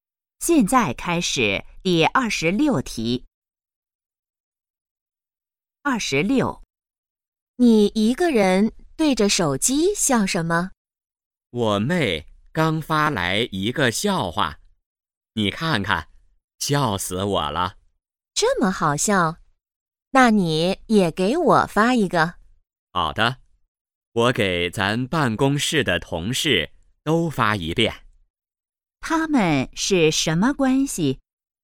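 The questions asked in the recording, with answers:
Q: 他们是什么关系?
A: 同事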